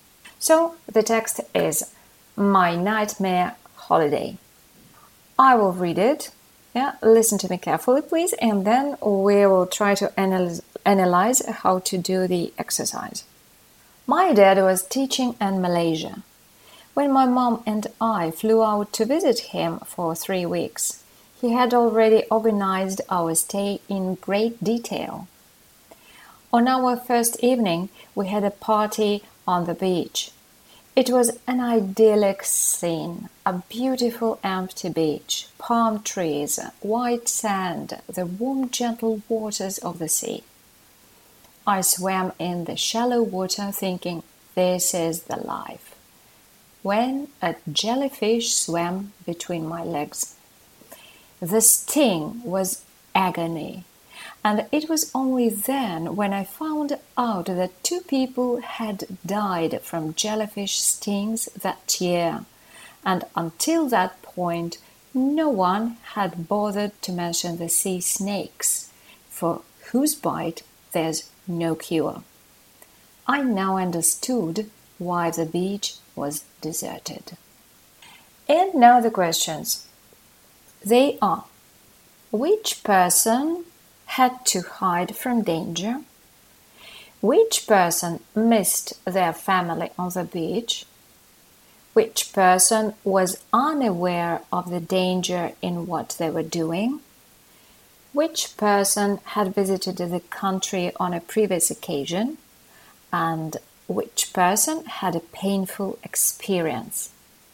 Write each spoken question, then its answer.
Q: Which person had to hide from danger?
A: there isn't anything about hiding from danger because the person didn't know about any danger at all.

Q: Which person missed their family on the beach?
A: it's false according to the text.

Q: Which person was unaware of the danger in what they were doing?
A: The fact that the person didn't know about the danger is reflected in the third option, saying that they were unaware of the danger in what they were doing.

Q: Which person had visited the country on a previous occasion?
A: It isn't suitable at all because the text doesn't say anything about if it was the first or the second visit to the country.

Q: And which person had a painful experience?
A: The word painful corresponds to the idea of agony, the key word that the person used to describe their feelings from a jellyfish sting.